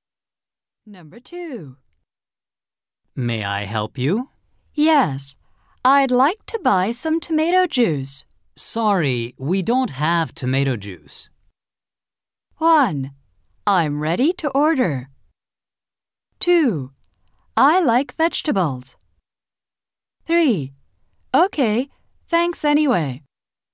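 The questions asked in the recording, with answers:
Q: Sorry, we don't have tomato juice.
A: 3: Okay, thanks anyway.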